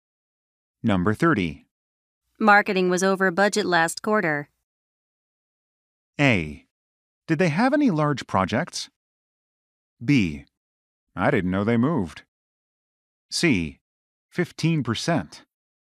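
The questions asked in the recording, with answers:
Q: Marketing was over budget last quarter.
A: A: Did they have any large projects?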